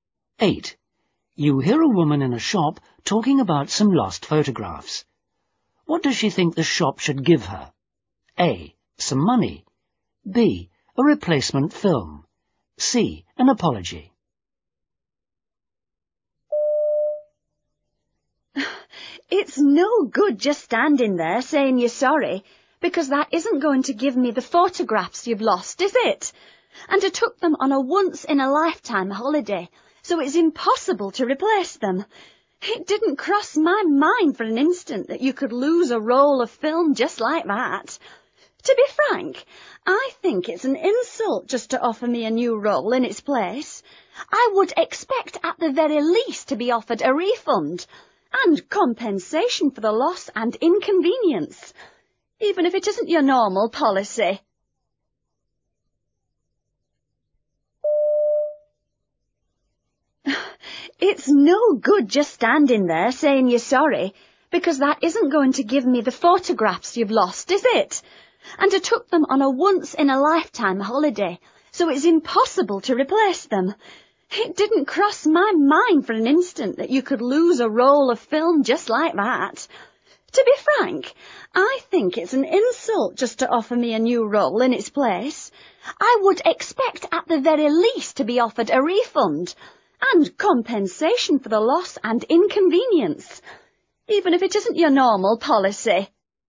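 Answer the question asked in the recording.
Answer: A: Some money.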